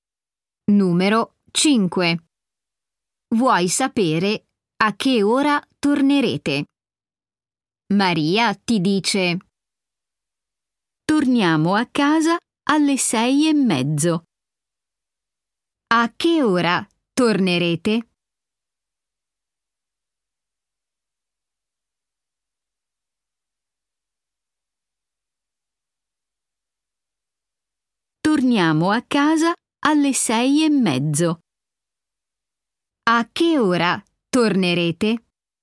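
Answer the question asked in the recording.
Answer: Alle 6:30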